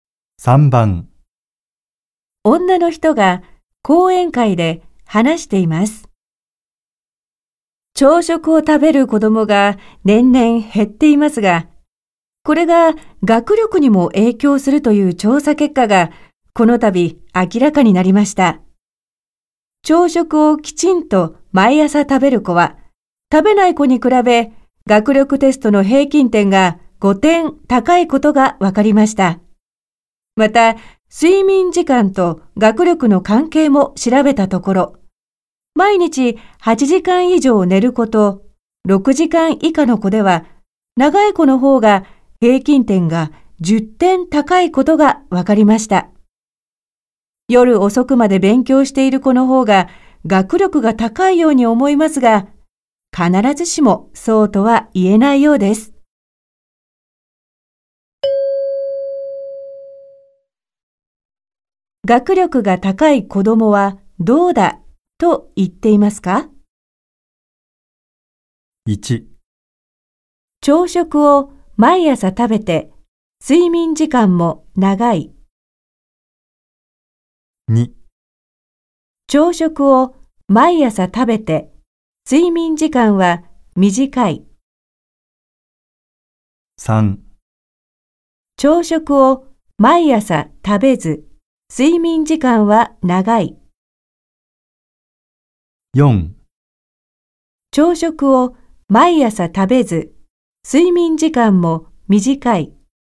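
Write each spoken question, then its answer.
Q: 学力が高い子供はどうだと言っていますか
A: 1: 朝食を毎朝食べて睡眠時間も長い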